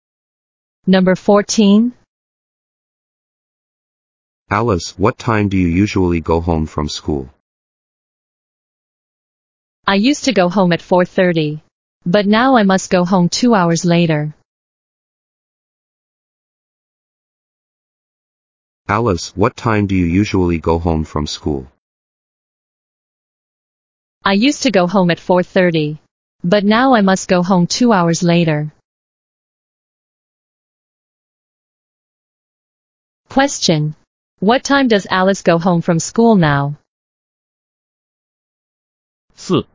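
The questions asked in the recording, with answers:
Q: What time does Alice go home from school now?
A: At 6:30.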